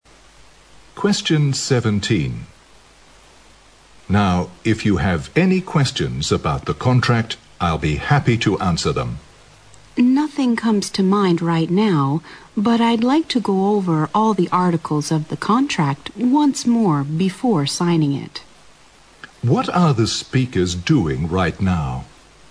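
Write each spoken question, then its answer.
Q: What are the speakers doing right now?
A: Discussing a contract before signing it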